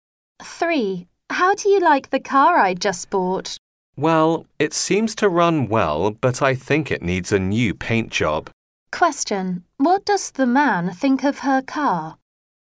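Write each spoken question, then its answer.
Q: What does the man think of her car?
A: It runs well but needs repainting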